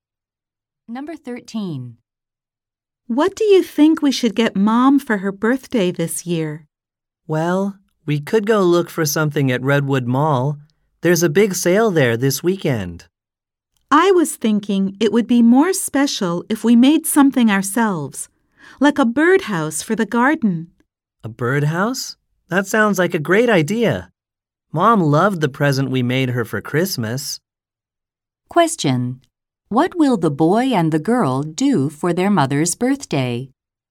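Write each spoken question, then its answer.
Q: What will the boy and the girl do for their mother's birthday?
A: Make her a birdhouse.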